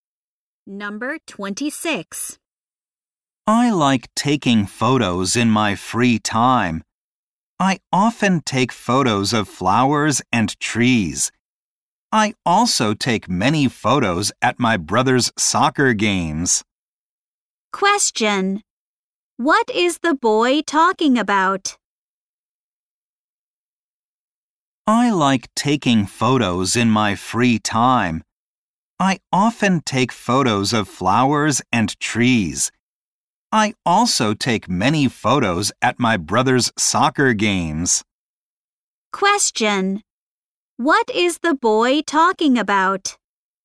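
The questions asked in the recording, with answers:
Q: Question. What is the boy talking about?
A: His hobby of taking photos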